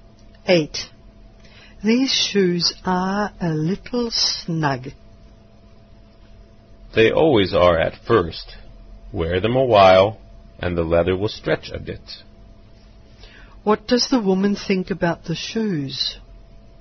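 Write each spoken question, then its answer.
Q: What does the woman think about the shoes?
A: They will stretch and fit after a while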